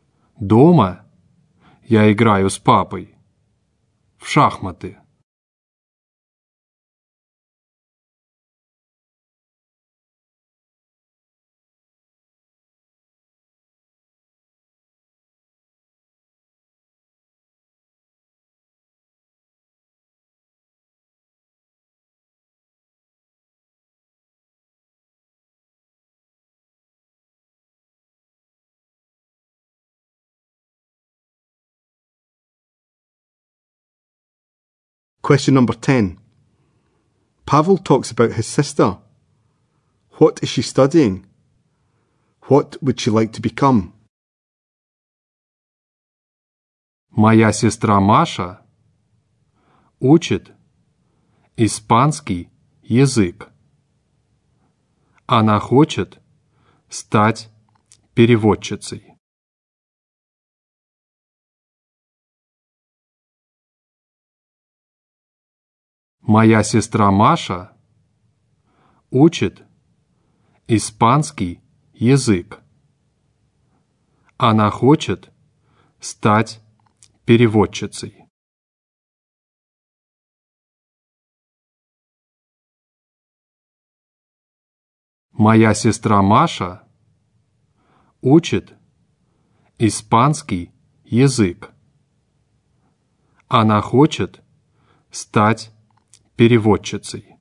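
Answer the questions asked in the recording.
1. Spanish
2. A translator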